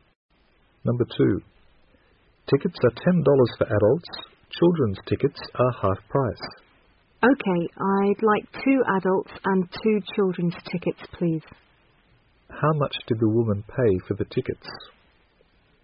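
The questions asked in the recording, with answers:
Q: How much did the woman pay for the tickets?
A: $30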